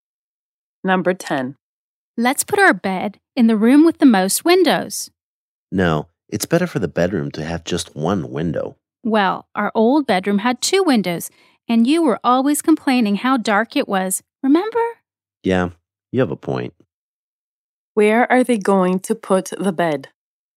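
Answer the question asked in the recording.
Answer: In the room with the most windows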